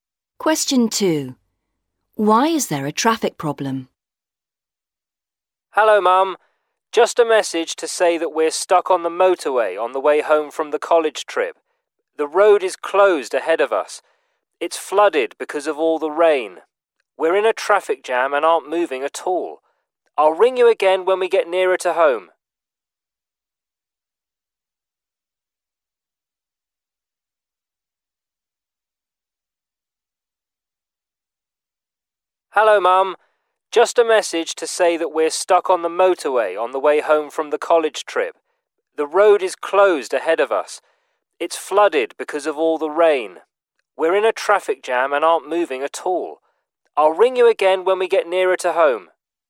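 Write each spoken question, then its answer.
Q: Why is there a traffic problem?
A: The road is flooded because of all the rain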